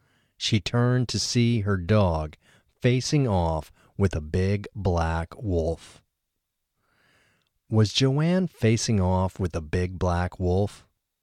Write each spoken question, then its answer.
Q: Was Joanne facing off with a big black wolf?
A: No, Joanne wasn't facing off with a big black wolf.